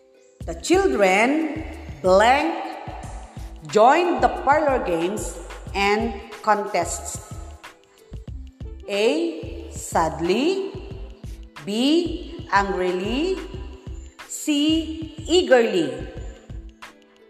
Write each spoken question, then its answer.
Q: The children blank joined the parlor games and contests.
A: So the answer is letter C, eagerly.